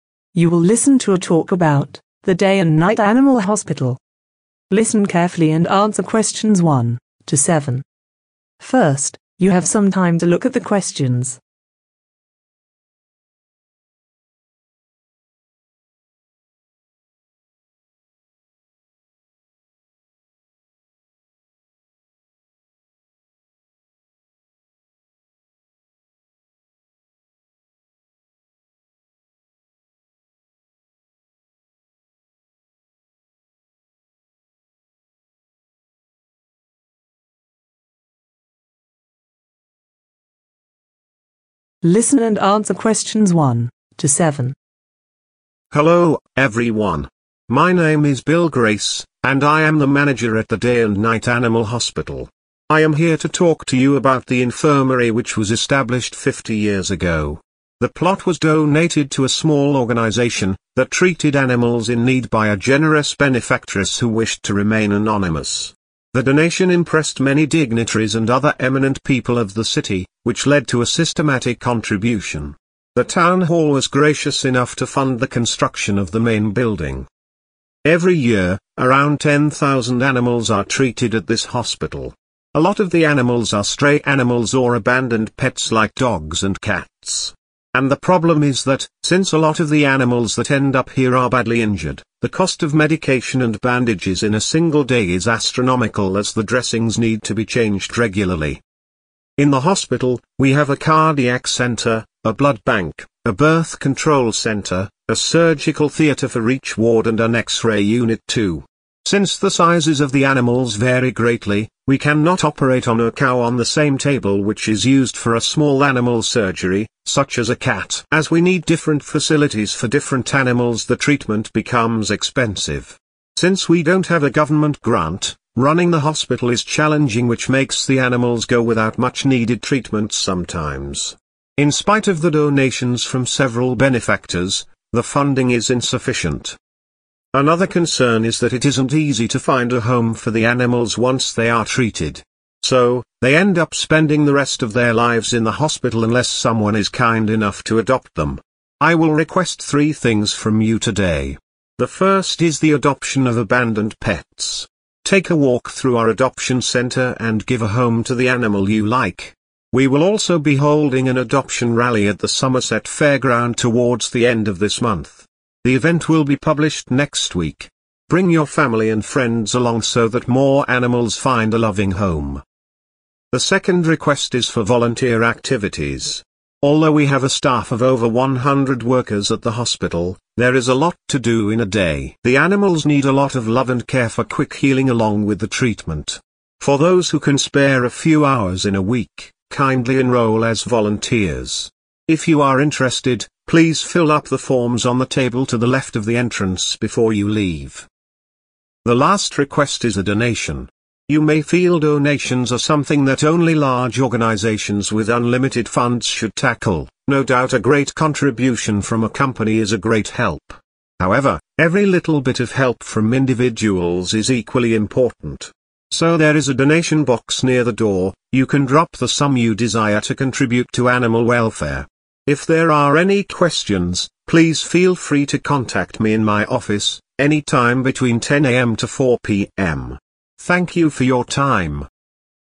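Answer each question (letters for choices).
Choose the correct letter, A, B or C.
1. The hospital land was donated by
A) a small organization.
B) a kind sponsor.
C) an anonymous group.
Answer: B

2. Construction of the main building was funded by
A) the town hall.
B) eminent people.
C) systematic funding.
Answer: A

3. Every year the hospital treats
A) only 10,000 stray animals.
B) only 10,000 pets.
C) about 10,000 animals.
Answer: C

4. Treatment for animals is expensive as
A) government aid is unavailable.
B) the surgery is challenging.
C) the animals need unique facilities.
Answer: C

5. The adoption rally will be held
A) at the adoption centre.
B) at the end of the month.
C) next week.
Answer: B

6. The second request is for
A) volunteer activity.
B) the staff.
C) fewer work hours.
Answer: A

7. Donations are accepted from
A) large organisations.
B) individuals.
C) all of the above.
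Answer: C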